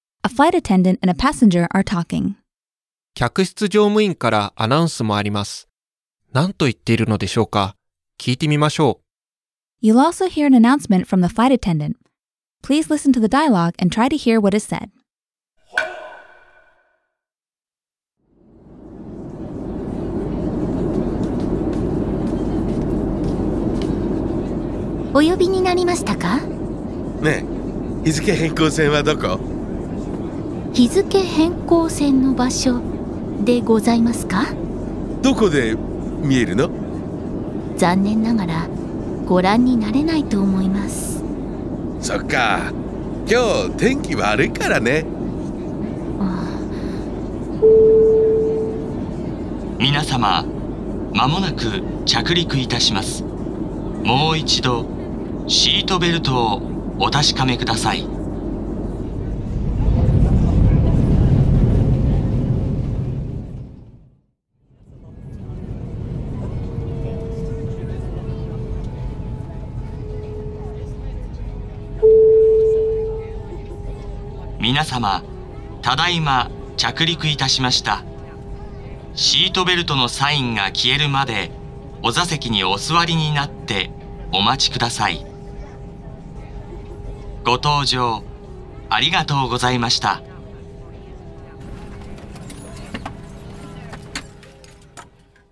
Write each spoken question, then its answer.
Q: 客室乗務員からアナウンスもあります。何と言っているのでしょうか?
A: 着陸の案内をしていたんですね。